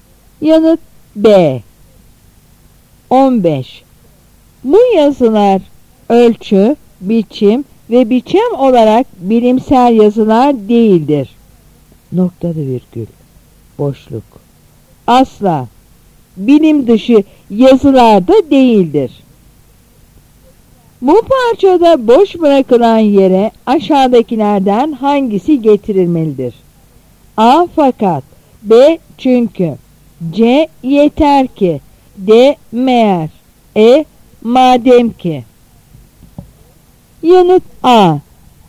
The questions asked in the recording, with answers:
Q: Bu parçada boş bırakılan yere aşağıdakilerden hangisi getirilmelidir?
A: Yanıt A.